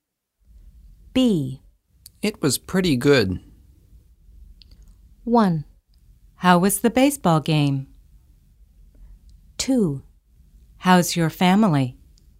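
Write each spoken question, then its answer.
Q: It was pretty good.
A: 1: How was the baseball game?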